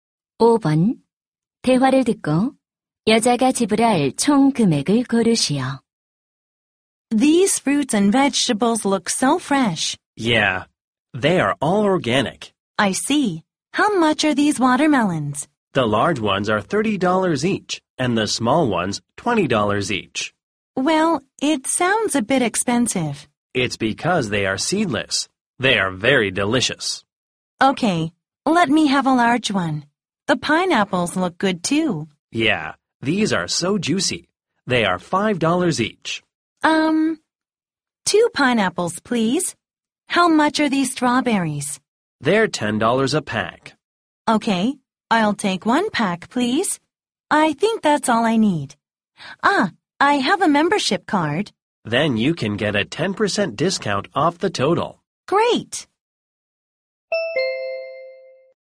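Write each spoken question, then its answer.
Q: 대화를 듣고 여자가 지불할 총 금액을 고르시오.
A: $45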